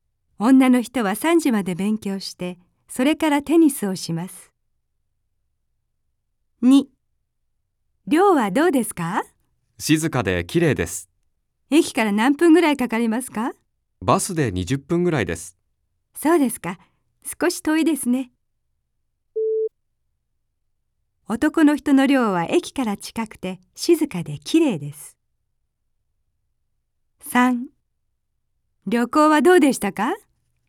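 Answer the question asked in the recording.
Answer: ×(駅からバスで20分で遠い)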